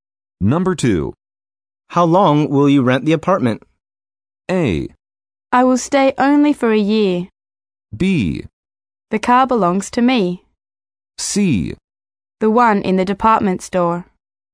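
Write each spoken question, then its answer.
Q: How long will you rent the apartment?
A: A: I will stay only for a year.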